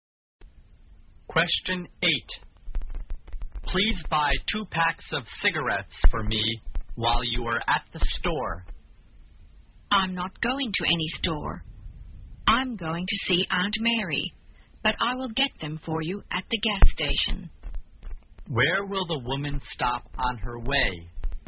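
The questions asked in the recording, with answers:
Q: Where will the woman stop on her way?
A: At the gas station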